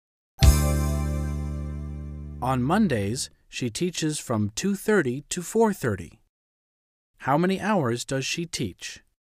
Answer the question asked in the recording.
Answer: She teaches for 2 hours.